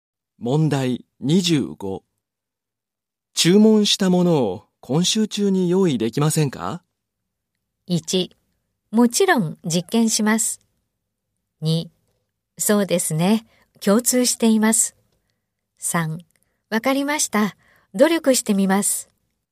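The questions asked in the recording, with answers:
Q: 注文したものを今週中に用意できませんか?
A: 1: わかりました。努力してみます。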